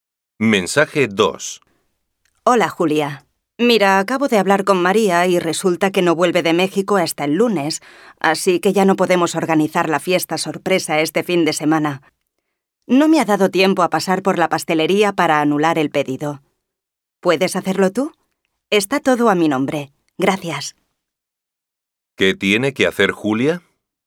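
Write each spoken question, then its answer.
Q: ¿Qué tiene que hacer Julia?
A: Anular el pedido en la pastelería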